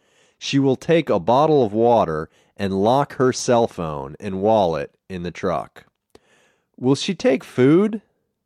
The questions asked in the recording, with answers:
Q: Will she take food?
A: No. She won't take food. She will take a bottle of water.